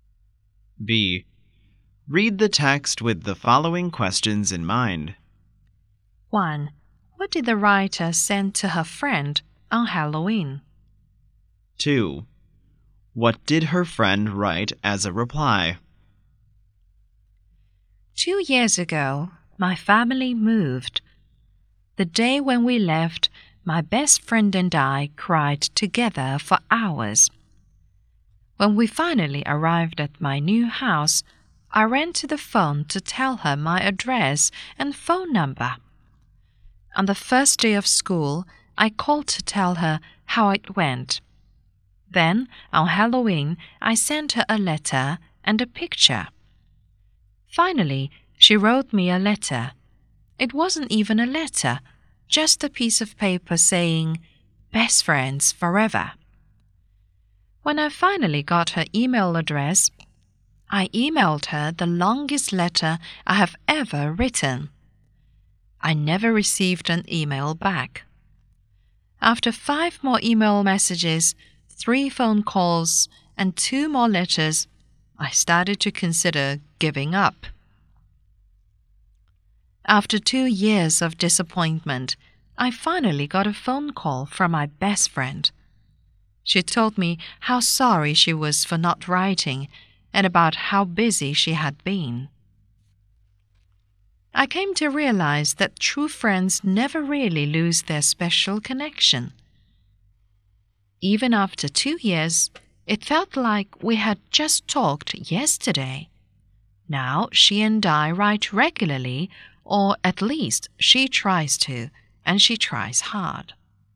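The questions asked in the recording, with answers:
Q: What did the writer send to her friend on Halloween?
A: A letter and a picture

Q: What did her friend write as a reply?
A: "Best friends forever" on a piece of paper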